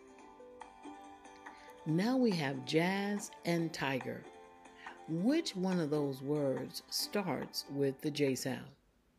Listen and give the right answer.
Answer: It is jazz. Jazz starts with the J sound.